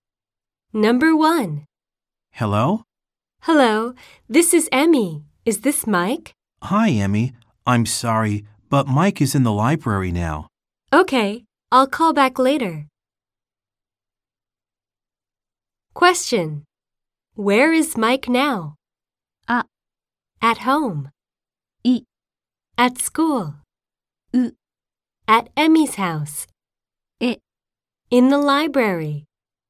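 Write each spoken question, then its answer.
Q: Where is Mike now?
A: E: In the library.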